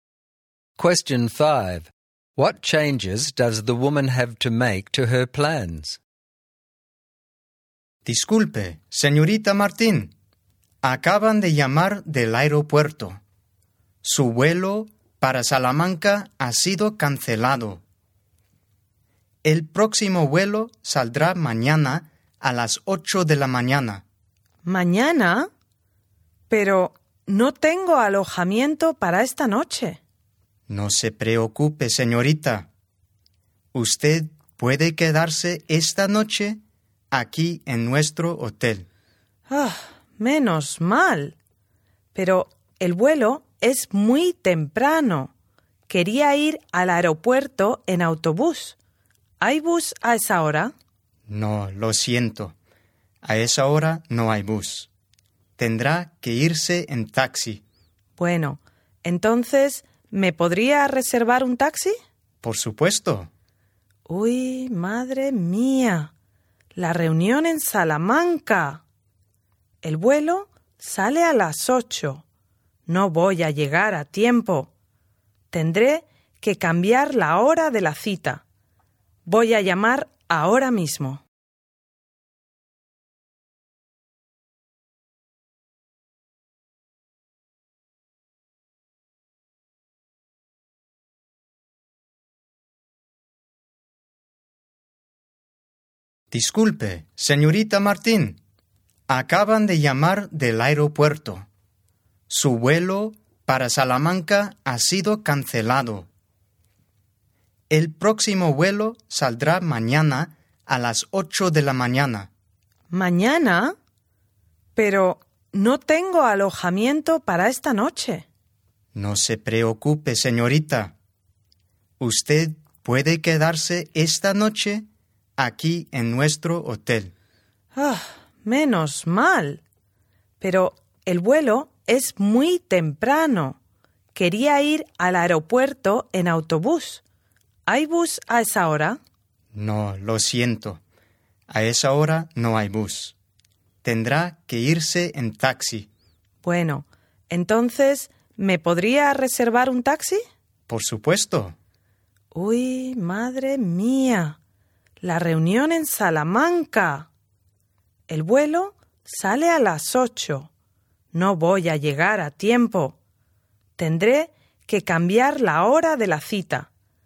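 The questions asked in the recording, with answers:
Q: What changes does the woman have to make to her plans?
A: Her flight was cancelled, so she must stay at the hotel tonight, fly tomorrow at 8, take a taxi instead of the bus, and change the time of her meeting in Salamanca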